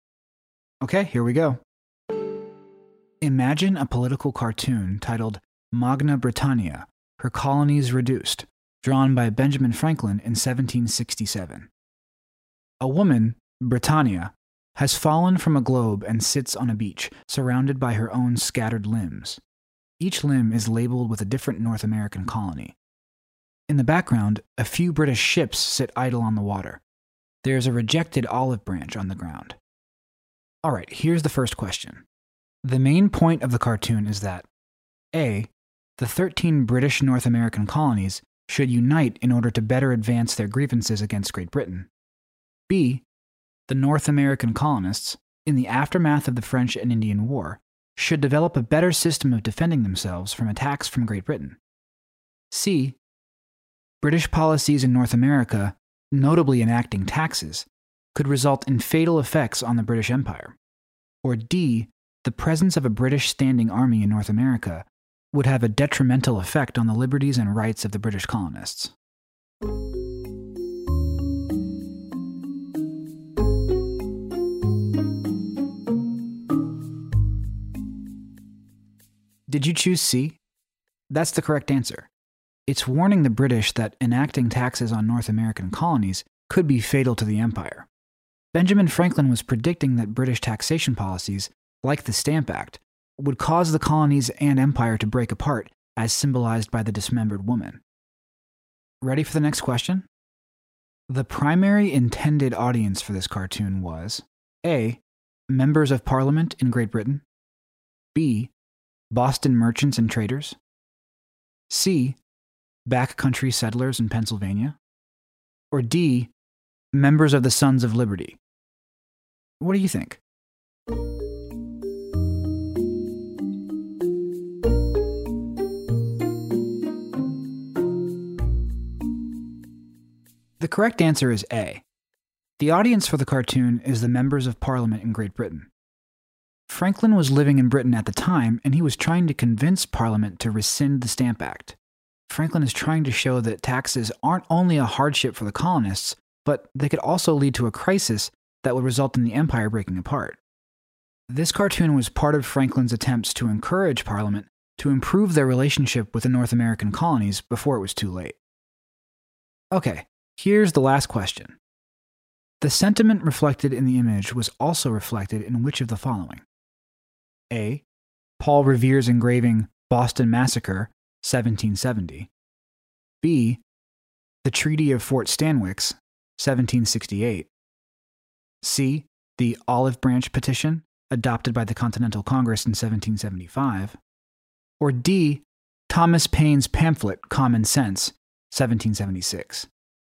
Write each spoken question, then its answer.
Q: The main point of the cartoon is that A.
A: Did you choose C? That's the correct answer.

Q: The primary intended audience for this cartoon was A.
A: The correct answer is A. The audience for the cartoon is the members of Parliament in Great Britain.